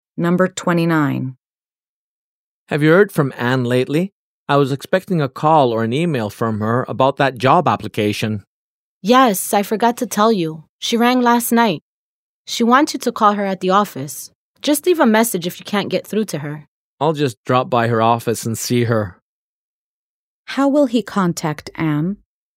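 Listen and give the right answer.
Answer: He will go to her office to see her.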